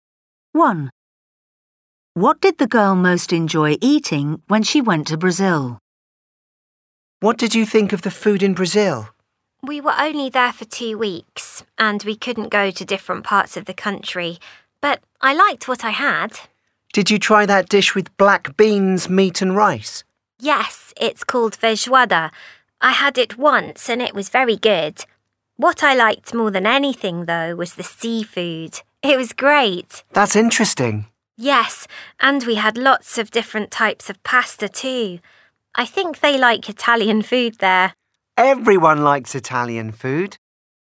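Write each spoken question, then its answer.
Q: What did the girl most enjoy eating when she went to Brazil?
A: seafood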